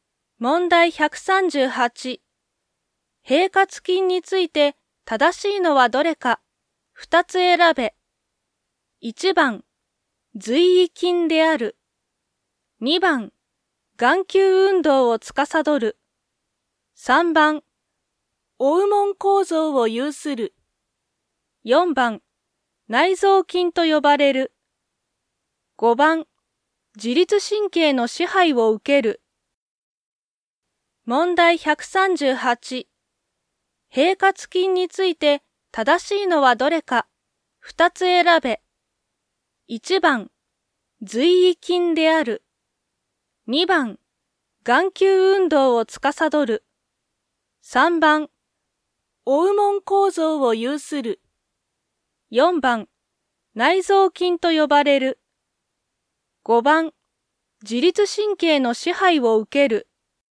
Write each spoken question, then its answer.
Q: 平滑筋について正しいのはどれか。二つ選べ。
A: 4番、内臓菌と呼ばれる。5番、自律神経の支配を受ける。